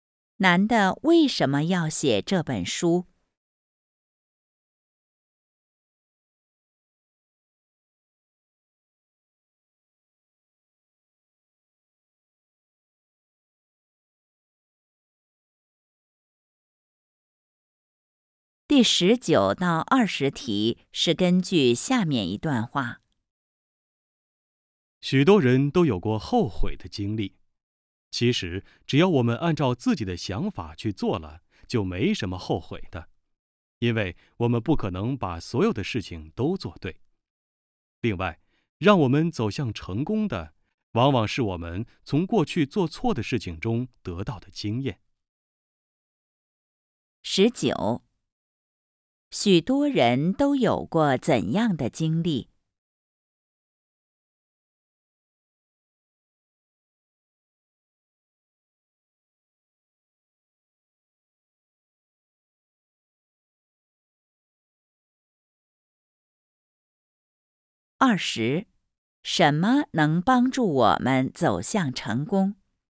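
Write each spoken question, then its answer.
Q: 许多人都有过怎样的经历?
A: 后悔的经历

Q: 什么能帮助我们走向成功?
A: 从过去做错的事情中得到的经验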